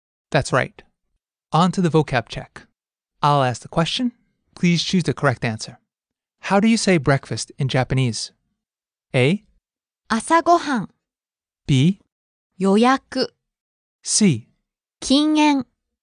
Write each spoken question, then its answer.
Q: How do you say breakfast in Japanese?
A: A. 朝ごはん.